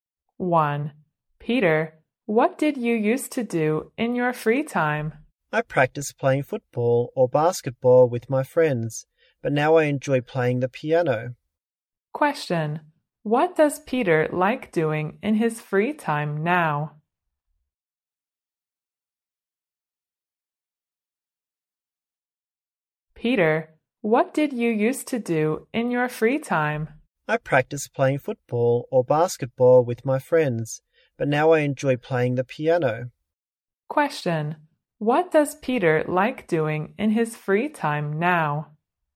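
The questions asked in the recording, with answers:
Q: What does Peter like doing in his free time now?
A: Playing the piano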